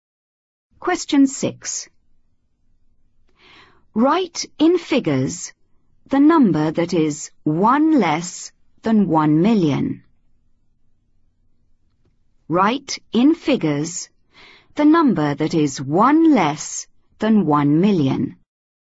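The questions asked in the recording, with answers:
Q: Write in figures the number that is 1 less than 1 million.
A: 999999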